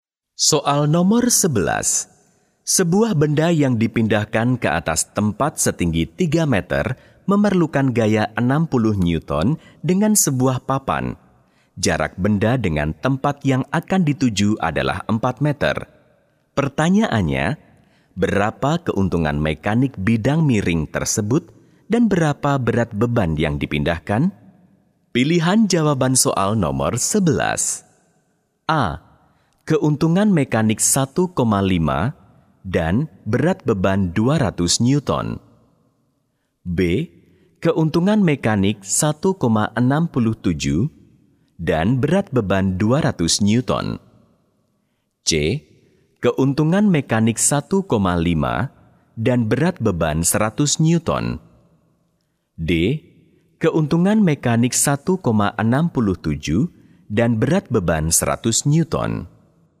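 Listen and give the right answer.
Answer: D: Keuntungan mekanik 1,67 dan berat beban 100 Newton.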